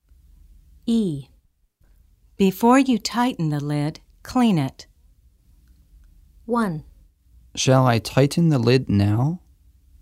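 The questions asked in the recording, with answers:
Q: Shall I tighten the lid now?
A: No, clean it first.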